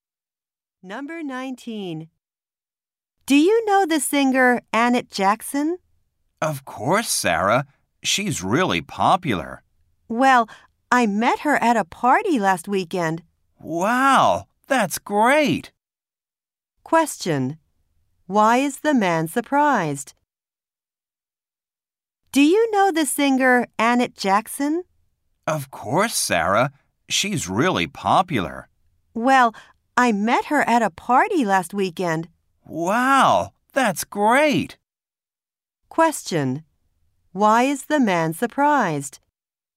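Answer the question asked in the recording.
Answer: Sarah met Annette Jackson at a party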